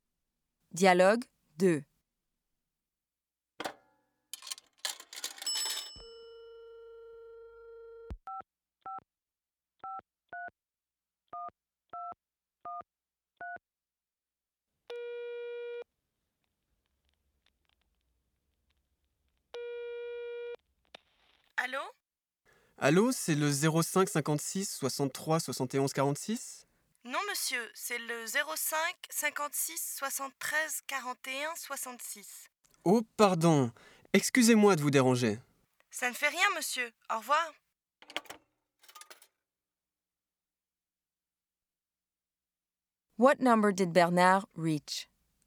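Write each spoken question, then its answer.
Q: What number did Bernard reach?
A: 05 56 73 41 66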